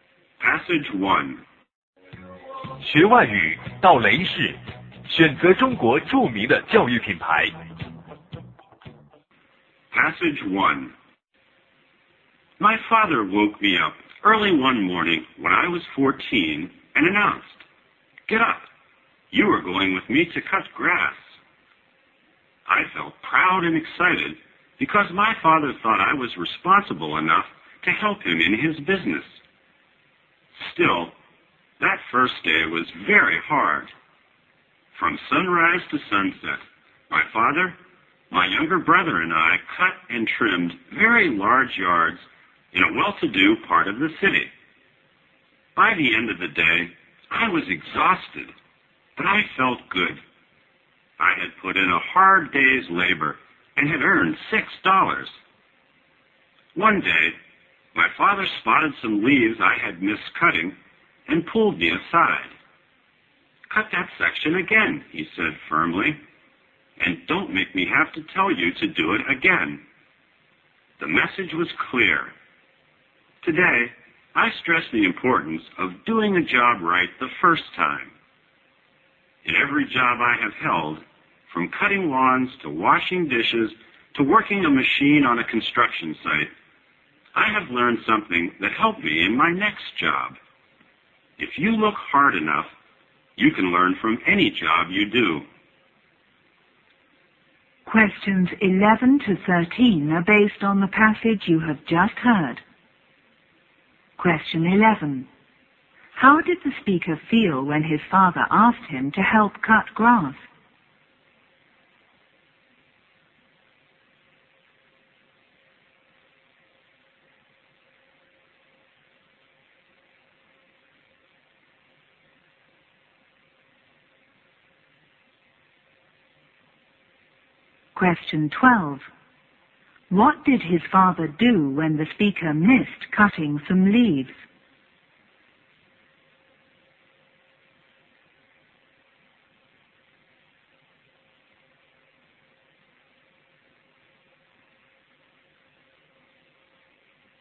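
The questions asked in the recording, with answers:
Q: How did the speaker feel when his father asked him to help cut grass?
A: Proud and excited

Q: What did his father do when the speaker missed cutting some leaves?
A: He told him firmly to cut that section again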